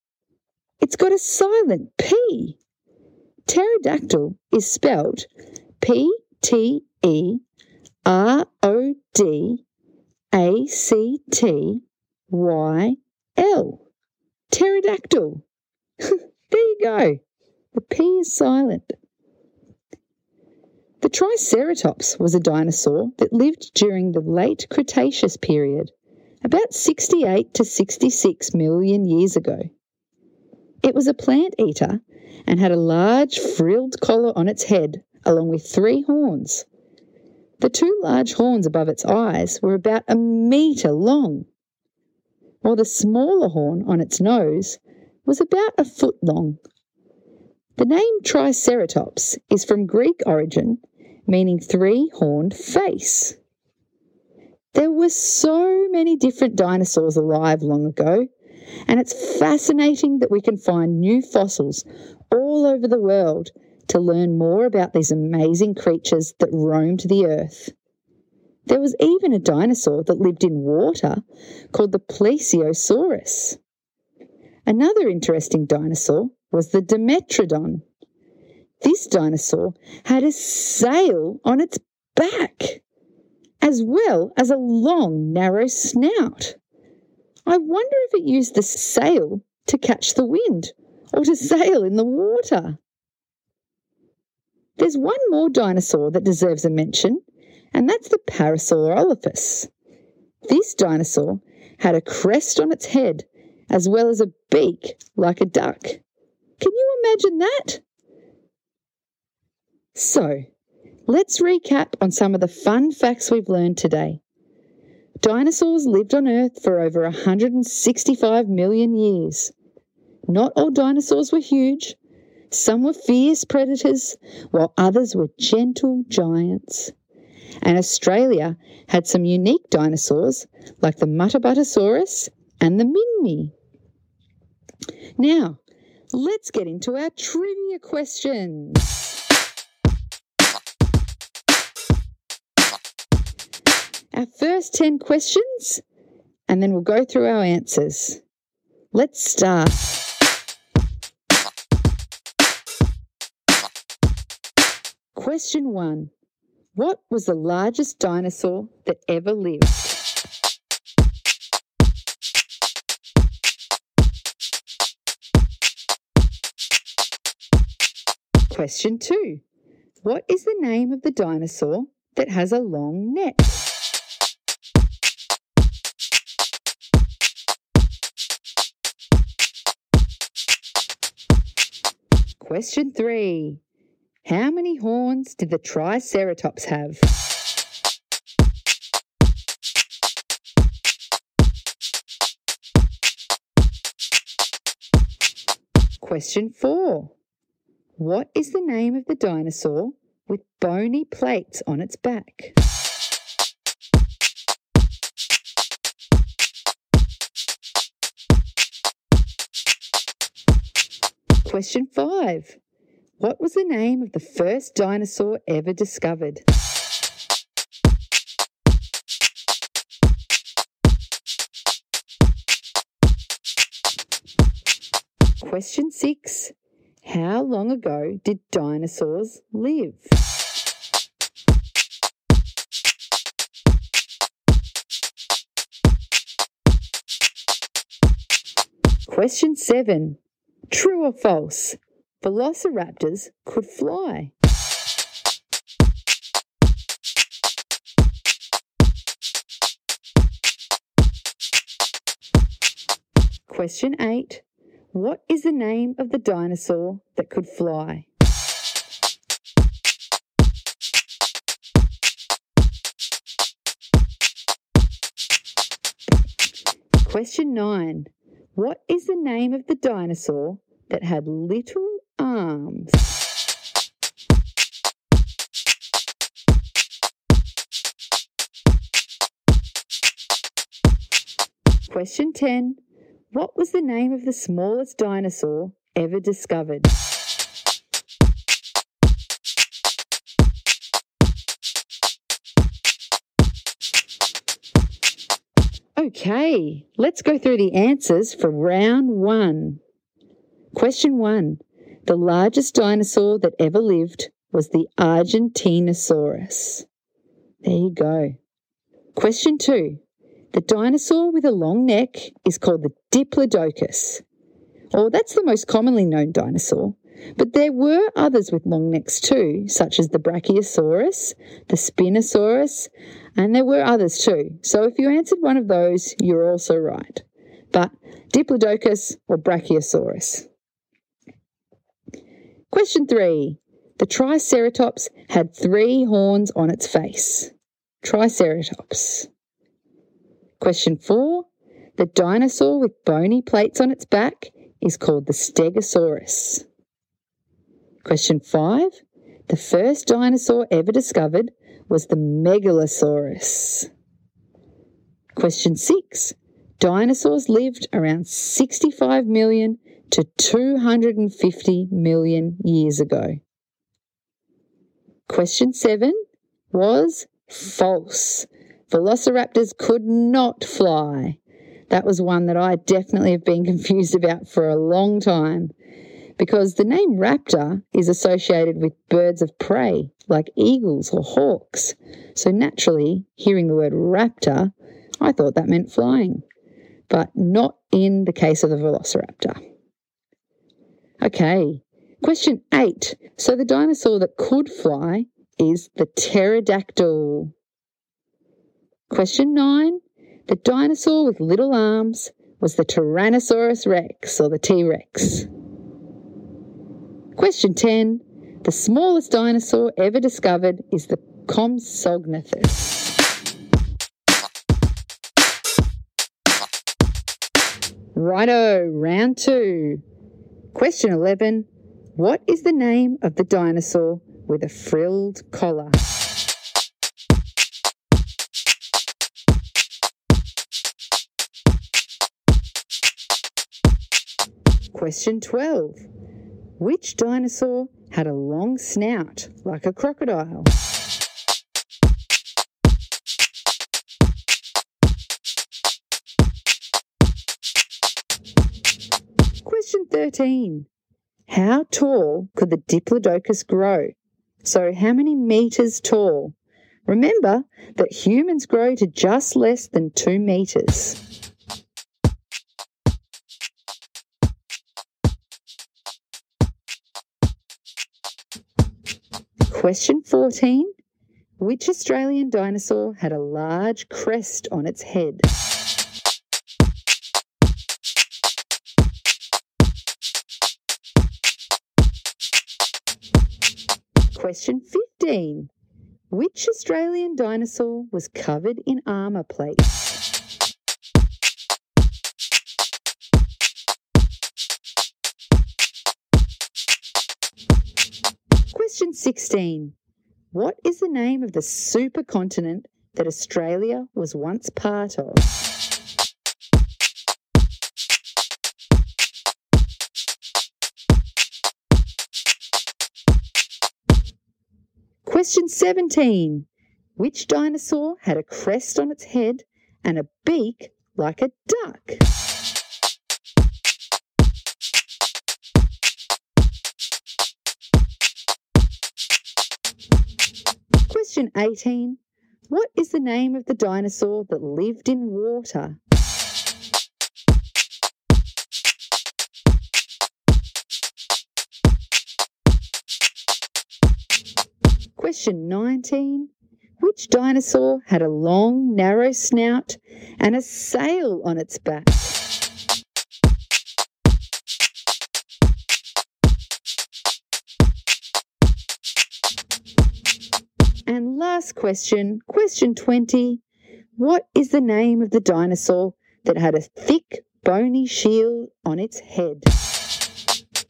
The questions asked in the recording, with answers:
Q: How many horns did the Triceratops have?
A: The Triceratops had three horns on its face.

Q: What is the name of the dinosaur that could fly?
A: So the dinosaur that could fly is the pterodactyl.

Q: What is the name of the dinosaur with a frilled collar?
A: The dinosaur with a frilled collar is the Triceratops.

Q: Which dinosaur had a crest on its head and a beak like a duck?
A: The dinosaur that had a beak like a duck and a crest on its head is the Parasaurolophus.

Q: What is the name of the dinosaur that lived in water?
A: The dinosaur that lived in water is the Plesiosaurus.

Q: Which dinosaur had a long, narrow snout and a sail on its back?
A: The dinosaur with a long, narrow snout and a sail on its back is the Dimetrodon.